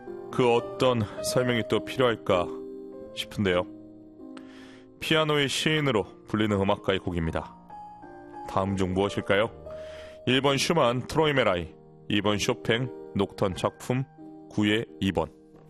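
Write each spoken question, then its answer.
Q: 다음 중 무엇일까요? 1번 슈만 트로이메라이, 2번 쇼팽 녹턴 작품 9의 2번.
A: 2: 쇼팽 녹턴 작품 9의 2번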